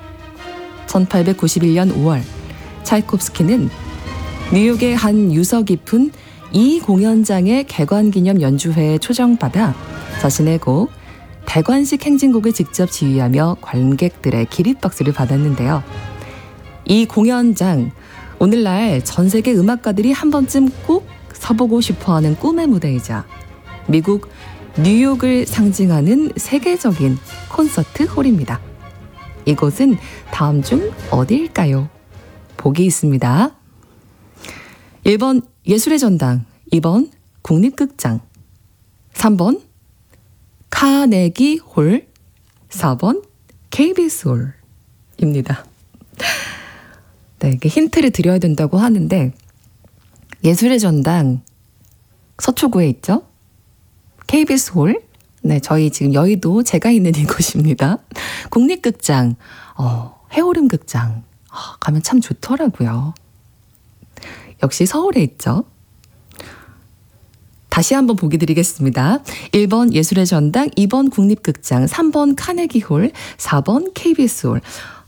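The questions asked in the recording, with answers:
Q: 이곳은 다음 중 어디일까요?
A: 3: 카네기 홀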